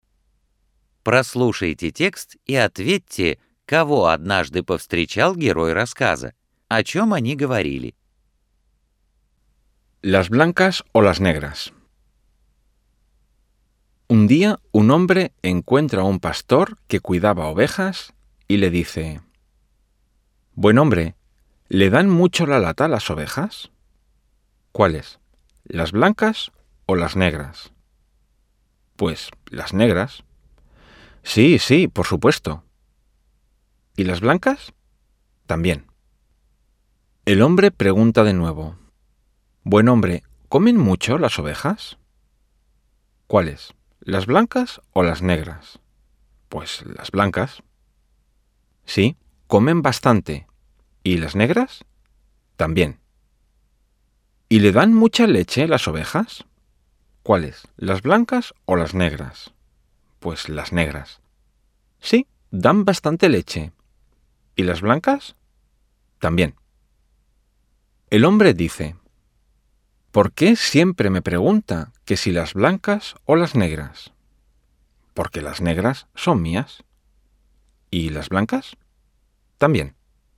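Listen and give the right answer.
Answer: Пастуха, который пас овец; они говорили об овцах (белых и чёрных)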